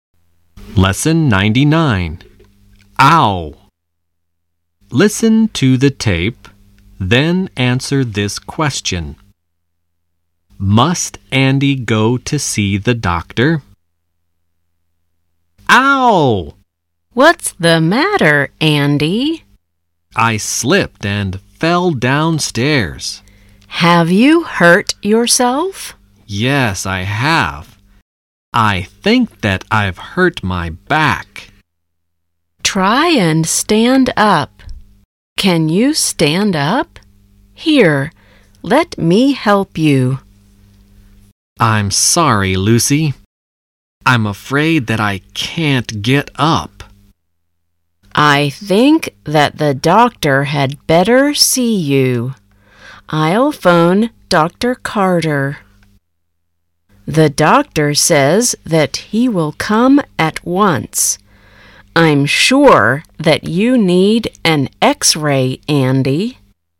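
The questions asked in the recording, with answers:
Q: Must Andy go to see the doctor?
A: No, the doctor will come to see him at once.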